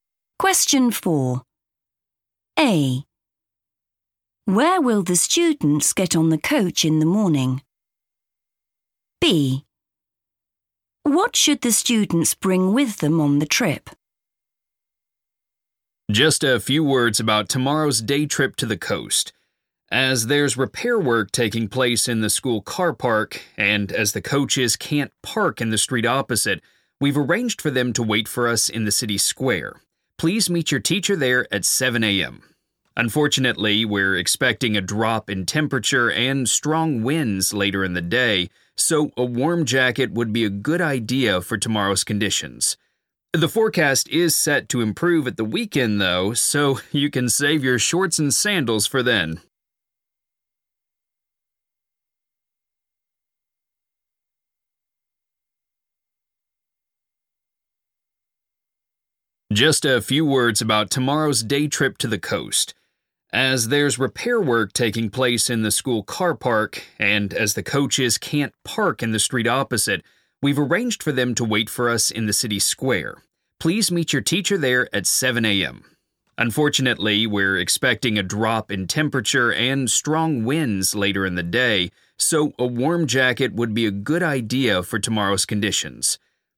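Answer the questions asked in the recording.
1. the city square
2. a warm jacket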